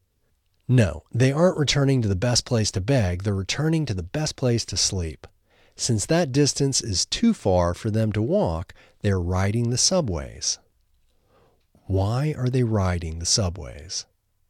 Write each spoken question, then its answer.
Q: Why are they riding the subways?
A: They are riding the subways because the distance is too far for them to walk.